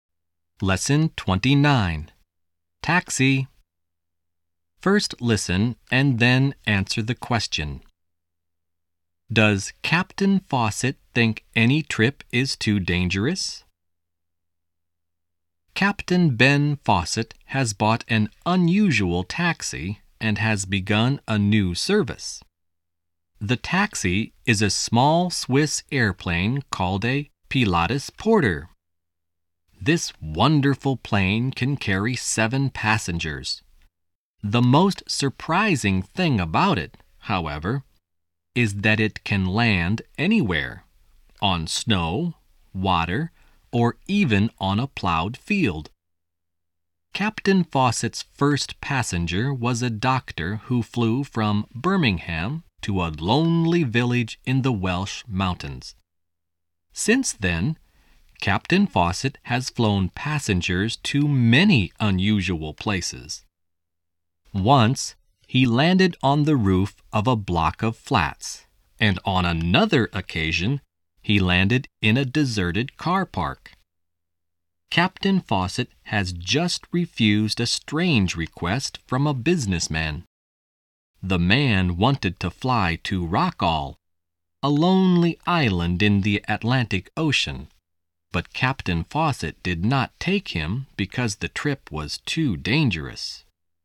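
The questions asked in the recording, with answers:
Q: Does Captain Fawcett think any trip is too dangerous?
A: Yes, he refused to fly a businessman to Rockall because the trip was too dangerous.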